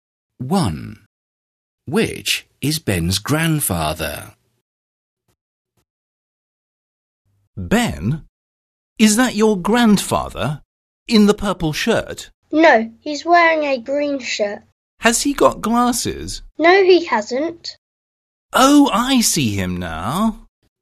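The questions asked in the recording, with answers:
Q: Which is Ben's grandfather?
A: The man in the green shirt without glasses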